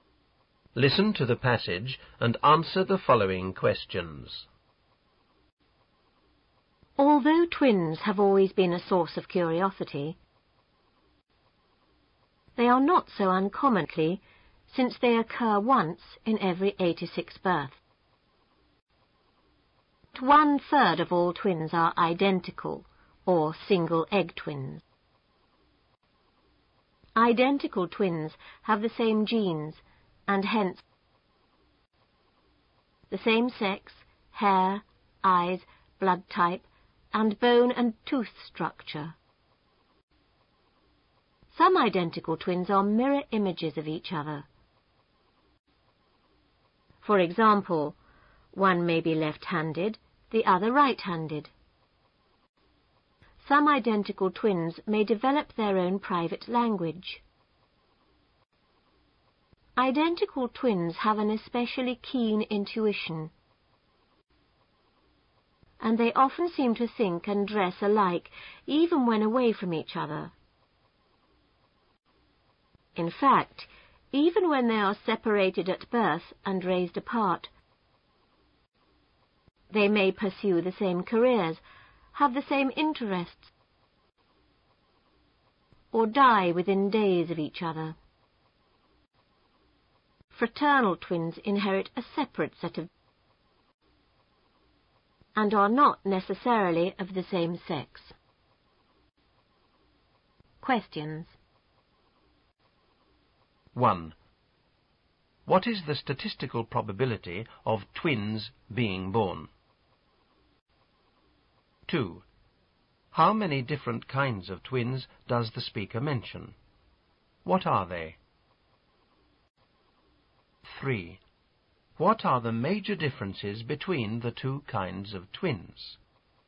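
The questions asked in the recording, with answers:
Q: What is the statistical probability of twins being born?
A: Once in every 86 births

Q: How many different kinds of twins does the speaker mention?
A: Two

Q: What are they?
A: Identical (single egg) twins and fraternal twins

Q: What are the major differences between the two kinds of twins?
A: Identical twins have the same genes and same sex; fraternal twins inherit separate sets of genes and are not necessarily the same sex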